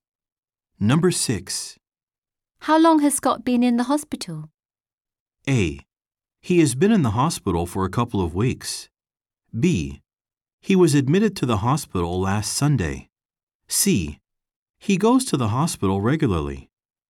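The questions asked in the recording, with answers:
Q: How long has Scott been in the hospital?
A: A: He has been in the hospital for a couple of weeks.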